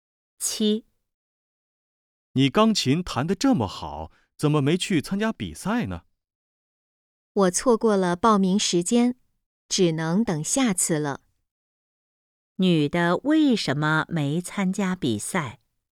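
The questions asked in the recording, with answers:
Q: 女的为什么没参加比赛?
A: 错过了报名时间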